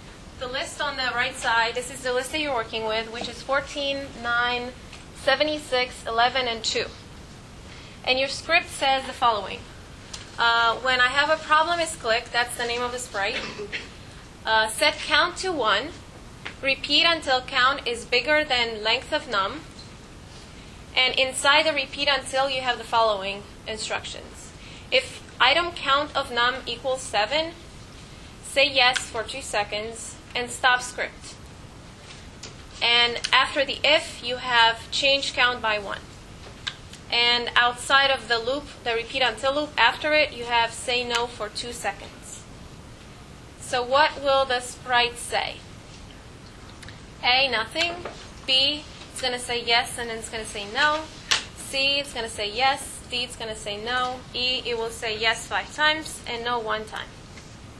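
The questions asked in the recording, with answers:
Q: So what will the sprite say?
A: D: it's going to say no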